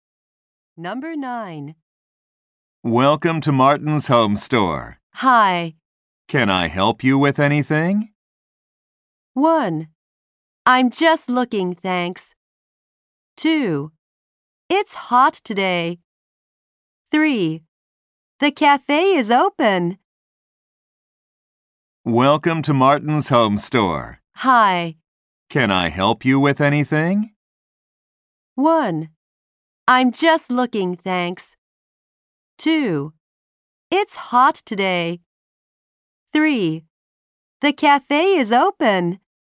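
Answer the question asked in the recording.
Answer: 1: I'm just looking, thanks.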